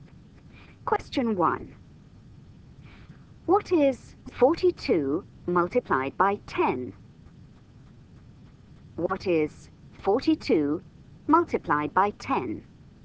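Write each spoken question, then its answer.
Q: What is 42 multiplied by 10?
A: 420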